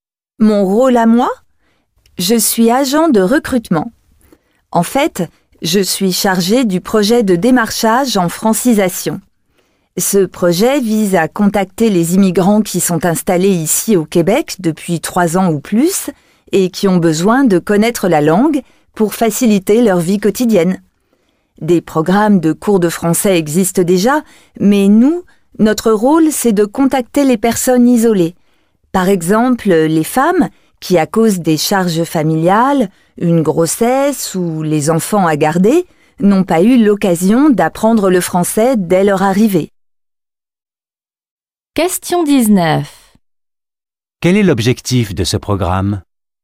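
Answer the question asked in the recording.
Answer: Contacter les immigrants isolés, installés au Québec depuis 3 ans ou plus, pour leur offrir d'apprendre le français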